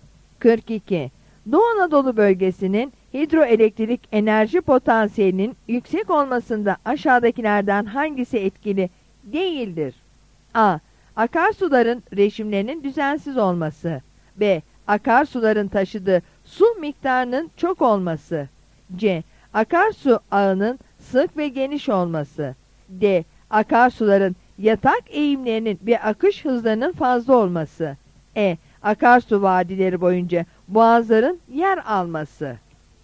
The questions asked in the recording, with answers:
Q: Doğu Anadolu bölgesinin hidroelektrik enerji potansiyelinin yüksek olmasında aşağıdakilerden hangisi etkili değildir?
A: Yanıt A'dır.